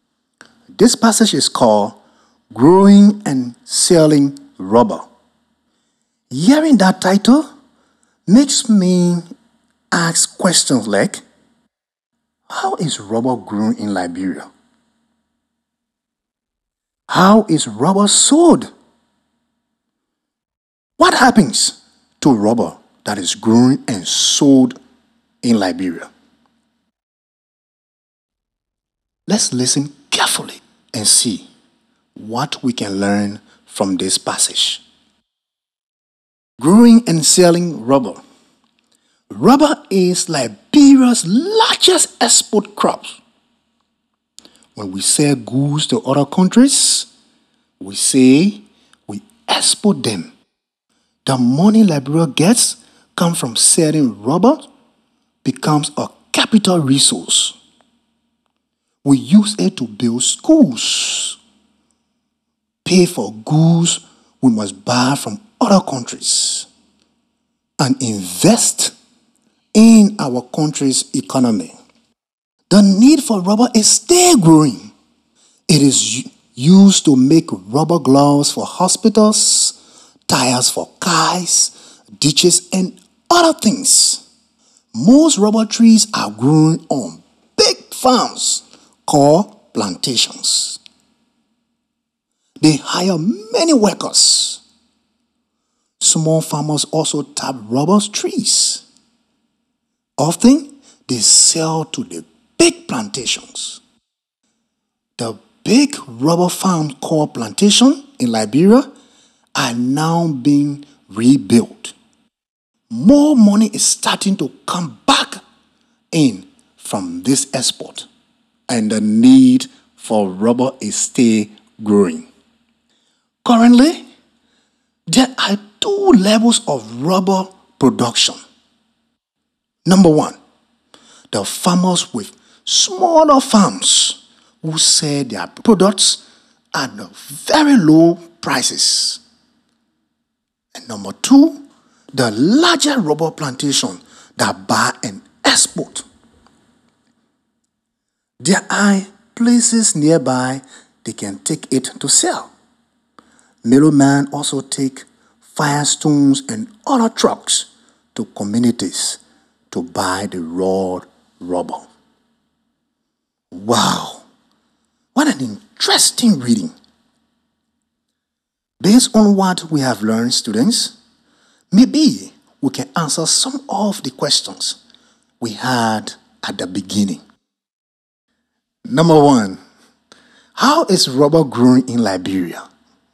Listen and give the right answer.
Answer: most rubber trees are grown on big farms called plantations.